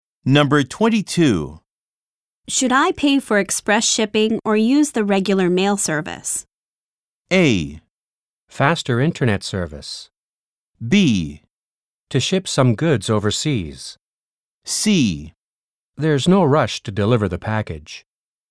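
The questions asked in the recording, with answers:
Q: Should I pay for express shipping or use the regular mail service?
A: C: There's no rush to deliver the package.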